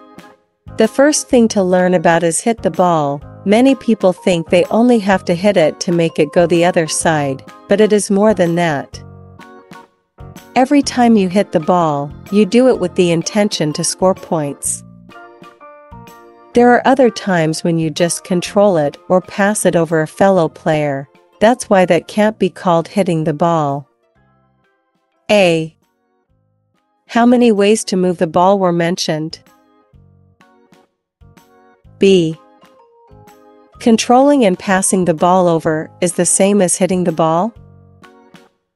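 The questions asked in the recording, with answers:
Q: How many ways to move the ball were mentioned?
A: Three: hit, control, pass

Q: Controlling and passing the ball over is the same as hitting the ball?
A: No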